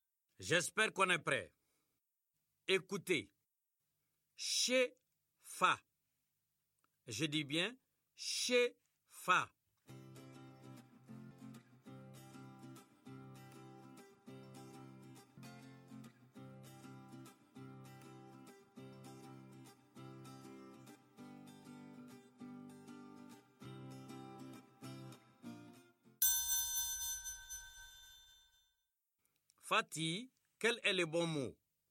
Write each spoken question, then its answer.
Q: Fatih, quel est le bon mot?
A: Fâché, monsieur.